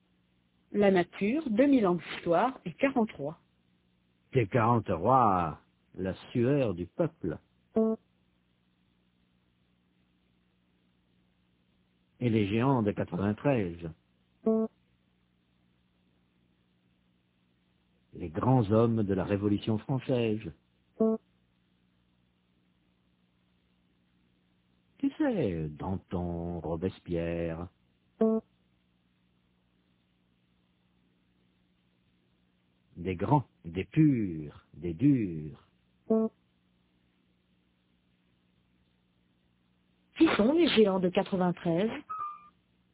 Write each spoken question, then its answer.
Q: Qui sont les géants de 93?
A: Les grands hommes de la Révolution française, Danton, Robespierre.